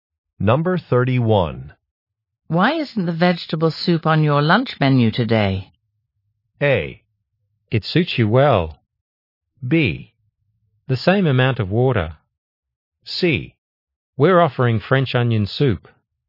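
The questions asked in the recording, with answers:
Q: Why isn't the vegetable soup on your lunch menu today?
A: C: We're offering French onion soup.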